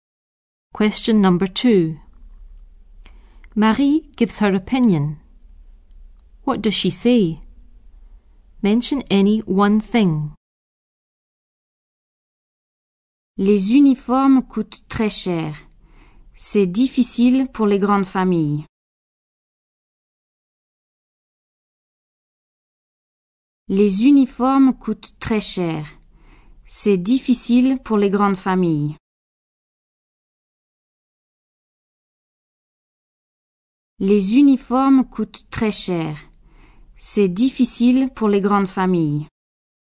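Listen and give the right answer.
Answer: Uniforms are very expensive; it's difficult for big families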